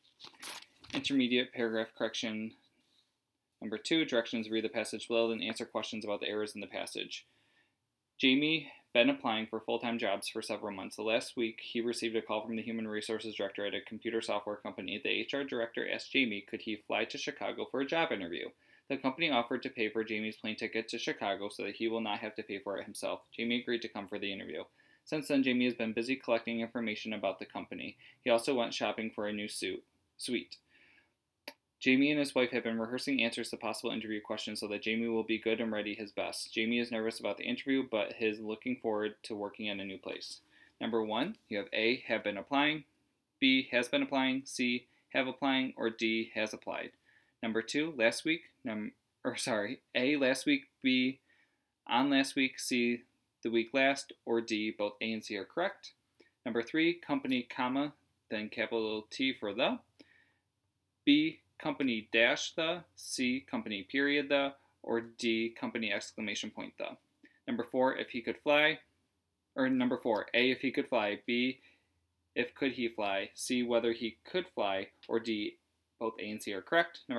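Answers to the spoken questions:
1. B: has been applying
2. A: last week
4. D: both A and C are correct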